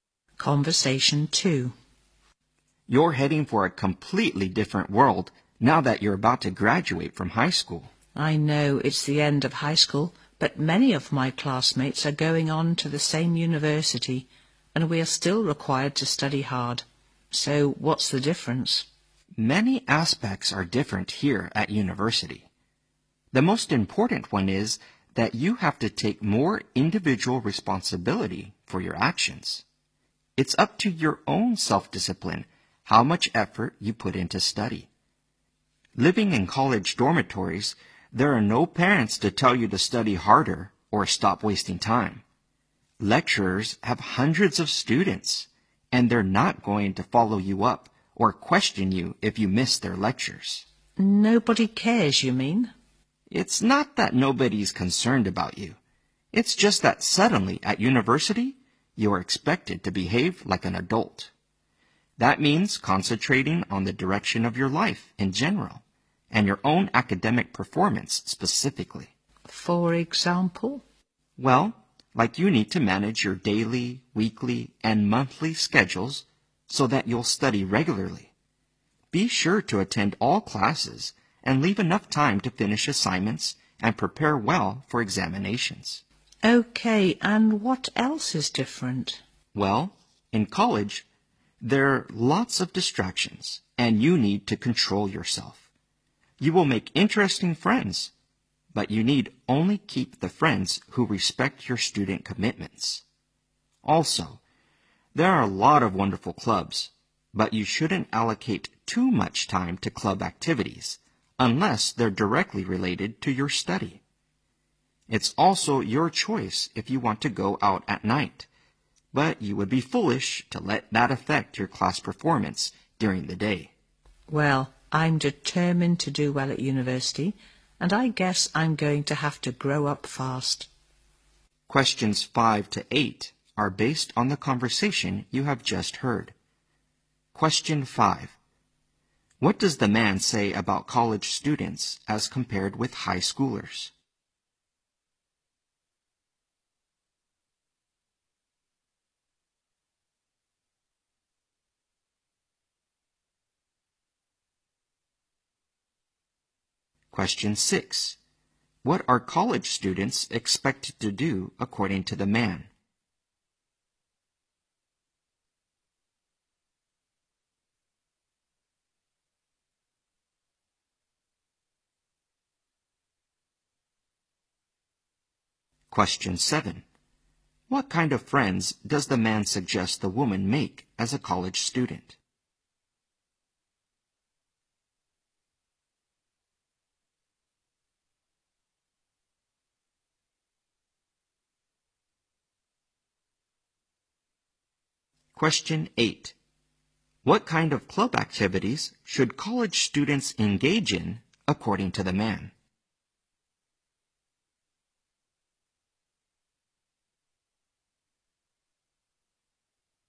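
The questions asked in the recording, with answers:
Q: What does the man say about college students as compared with high schoolers?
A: They have to take more individual responsibility for their actions

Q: What are college students expected to do according to the man?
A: Behave like adults

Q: What kind of friends does the man suggest the woman make as a college student?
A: Friends who respect her student commitments

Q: What kind of club activities should college students engage in, according to the man?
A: Those directly related to their study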